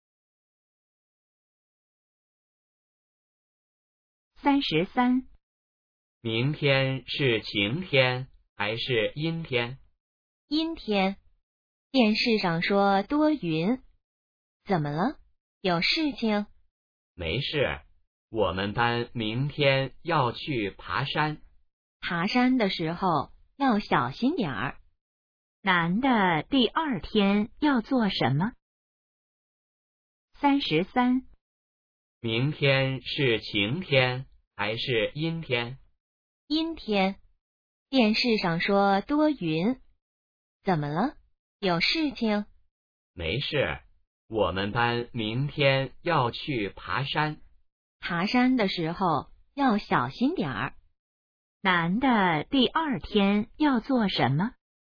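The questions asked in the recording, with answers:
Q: 男的第二天要做什么?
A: 去爬山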